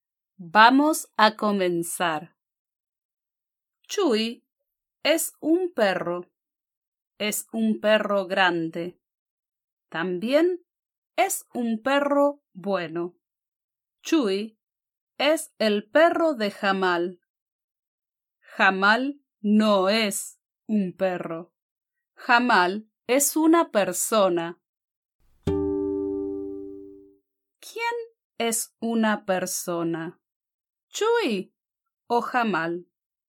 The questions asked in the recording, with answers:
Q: ¿Quién es una persona? ¿Chuy o Jamal?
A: Sí, Tienes razón. Jamal es una persona.